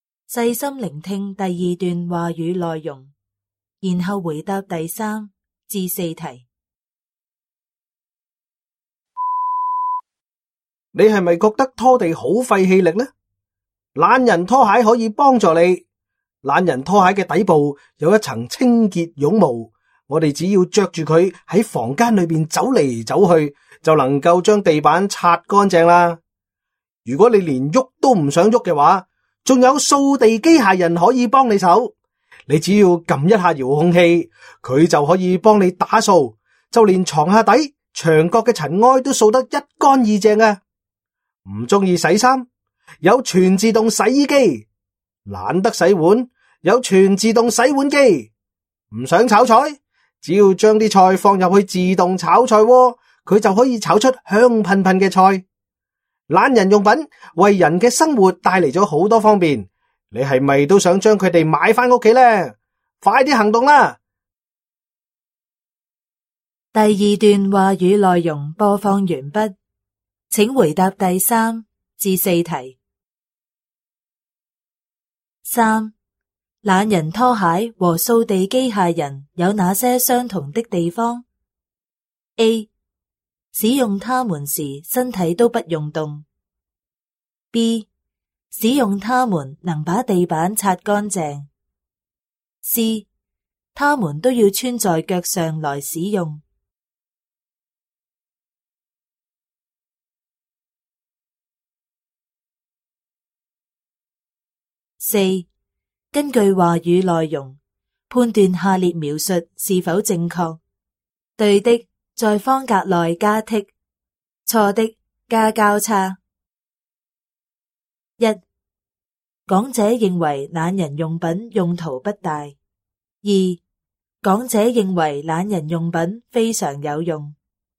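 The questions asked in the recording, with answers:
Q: 懒人拖鞋和扫地机械人有哪些相同的地方? A. 使用它们时身体都不用动。 B. 使用它们能把地板擦干净。 C. 它们都要穿在脚上来使用。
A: B: 使用它们能把地板擦干净。

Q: 根据话语内容判断下列描述是否正确。对的,在方格内加剔;错的,加交叉。 一,讲者认为懒人用品用途不大。二,讲者认为懒人用品非常有用。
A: 一:错;二:对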